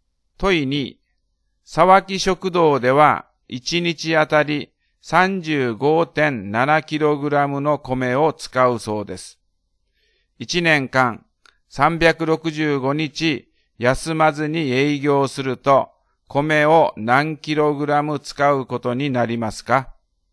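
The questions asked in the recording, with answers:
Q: 1年間365日休まずに営業すると米を何 kg 使うことになりますか?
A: 13030.5kg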